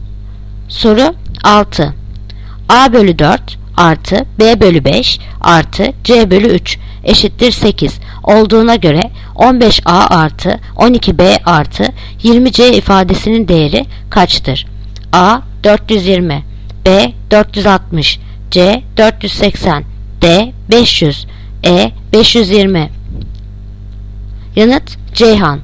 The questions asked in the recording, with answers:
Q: A bölü 4 artı B bölü 5 artı C bölü 3 eşittir 8 olduğuna göre 15A artı 12B artı 20C ifadesinin değeri kaçtır?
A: Yanıt Ceyhan. 480.